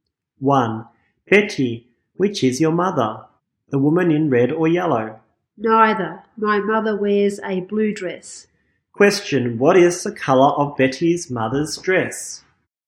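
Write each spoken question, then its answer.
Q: Question, what is the color of Betty's mother's dress?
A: Blue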